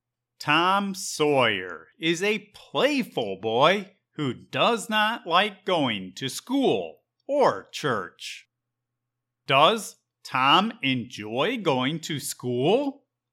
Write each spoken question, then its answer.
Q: Does Tom enjoy going to school?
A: No. Tom is a playful boy who does not like going to school.